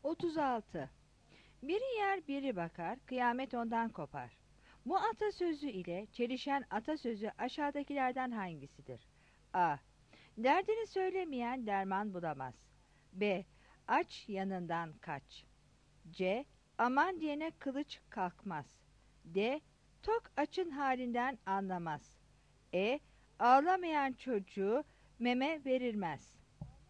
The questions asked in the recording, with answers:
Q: Bu atasözü ile çelişen atasözü aşağıdakilerden hangisidir?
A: 36 B